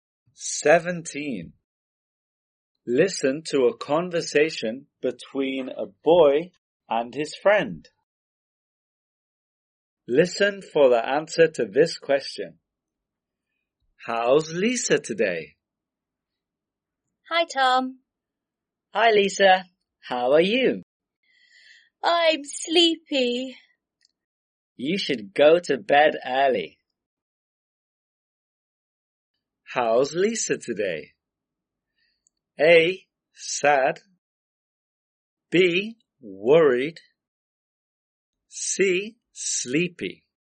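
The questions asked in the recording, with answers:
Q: How's Lisa today?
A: C: Sleepy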